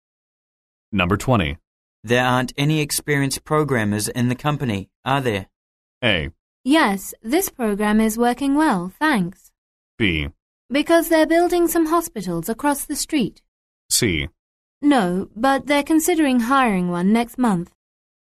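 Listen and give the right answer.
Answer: C: No, but they're considering hiring one next month.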